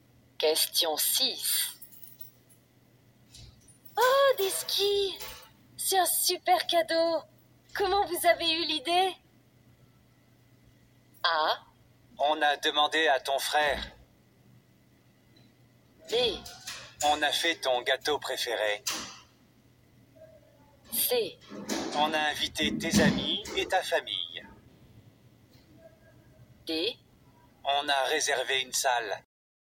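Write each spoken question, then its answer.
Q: Comment vous avez eu l'idée?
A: A: On a demandé à ton frère.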